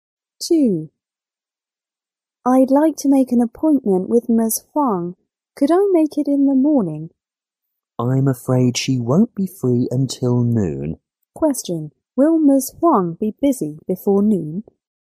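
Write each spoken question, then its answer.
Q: Will Ms. Huang be busy before noon?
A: Yes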